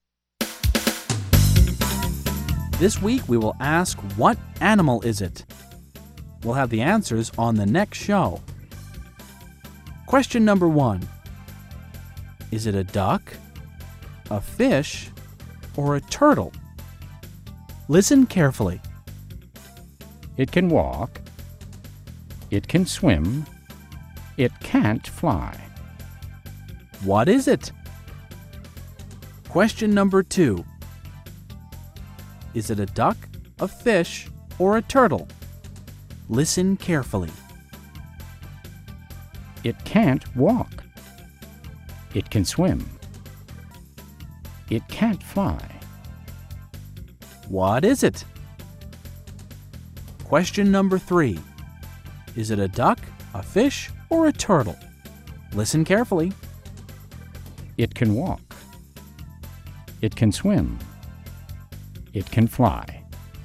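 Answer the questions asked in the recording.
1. a turtle
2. a fish
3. a duck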